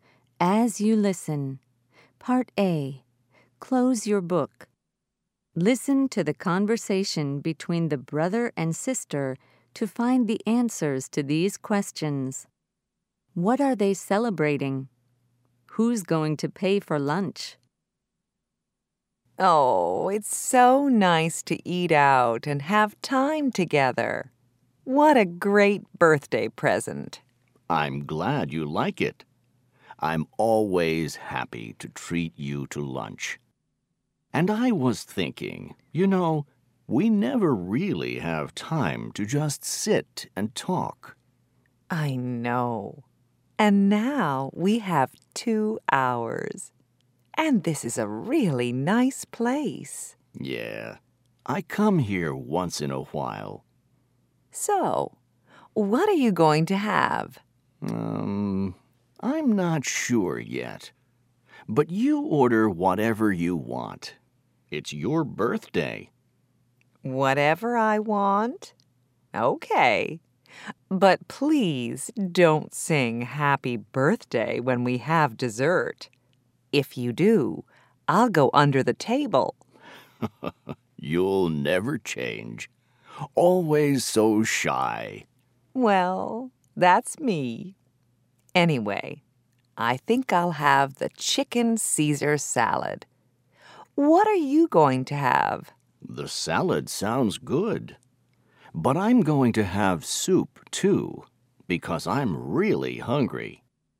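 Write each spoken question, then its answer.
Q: What are they celebrating?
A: A birthday (the sister's birthday)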